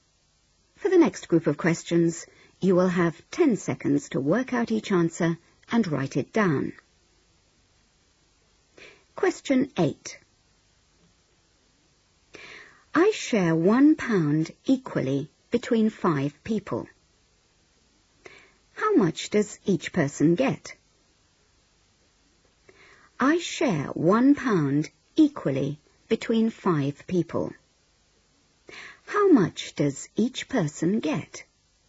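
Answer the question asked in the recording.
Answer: 20p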